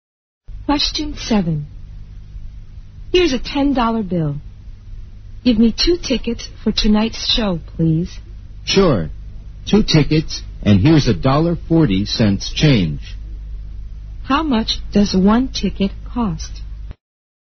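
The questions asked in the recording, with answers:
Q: How much does 1 ticket cost?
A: $4.30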